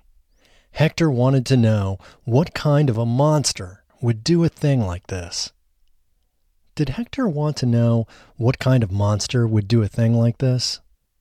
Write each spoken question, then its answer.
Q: Did Hector want to know what kind of monster would do a thing like this?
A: Yes, Hector wanted to know what kind of monster would do a thing like this.